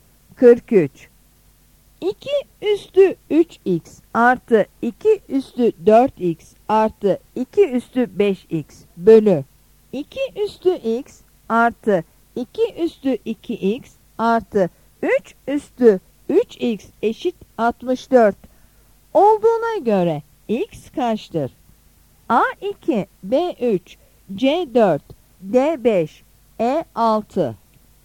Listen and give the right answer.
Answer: Yanıt B'dir.